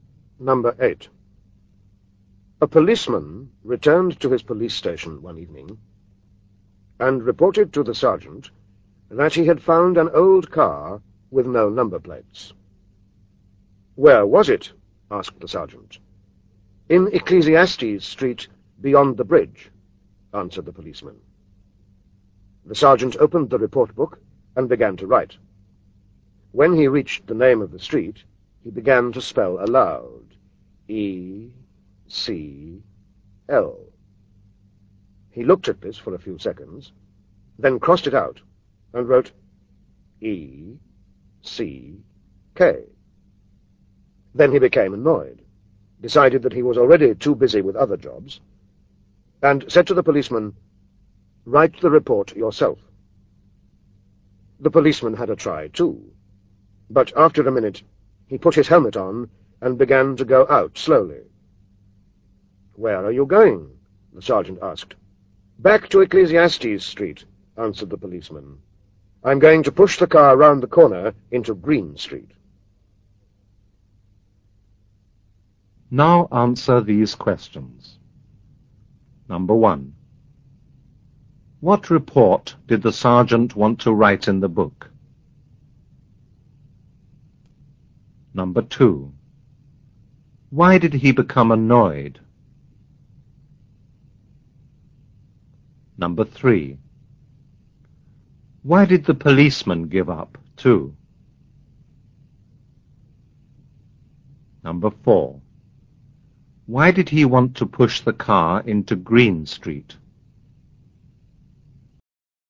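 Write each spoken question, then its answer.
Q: What report did the sergeant want to write in the book?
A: About an old car with no number plates found in Ecclesiastes Street

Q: Why did he become annoyed?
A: He couldn't spell the name of the street

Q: Why did the policeman give up, too?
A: He couldn't spell Ecclesiastes either

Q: Why did he want to push the car into Green Street?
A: Because Green Street is easy to spell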